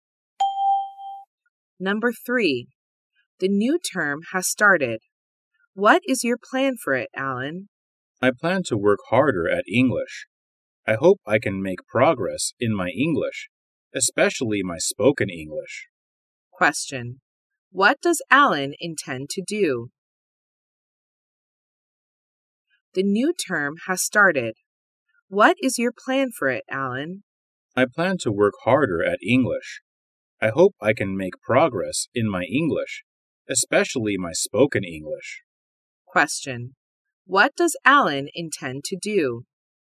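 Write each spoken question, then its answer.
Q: What does Alan intend to do?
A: Work harder at English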